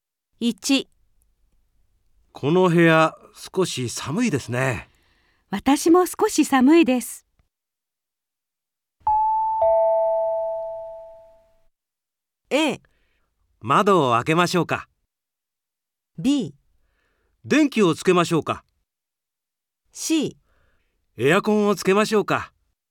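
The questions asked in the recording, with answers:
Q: この部屋少し寒いですね。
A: C: エアコンをつけましょうか。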